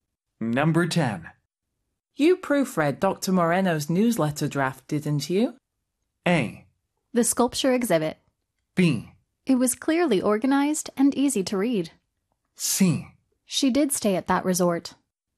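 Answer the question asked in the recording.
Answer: B: It was clearly organized and easy to read.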